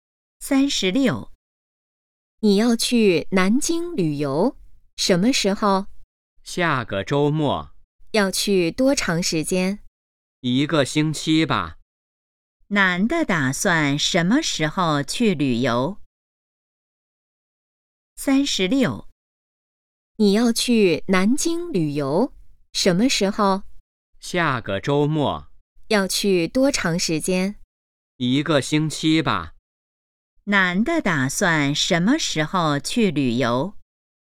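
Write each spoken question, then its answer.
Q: 男的打算什么时候去旅游?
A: 下个周末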